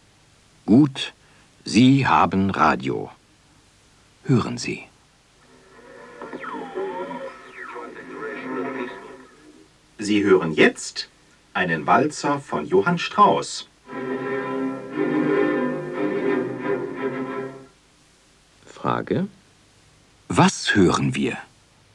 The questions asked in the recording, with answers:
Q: Was hören wir?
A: Wir hören einen Walzer von Johann Strauss.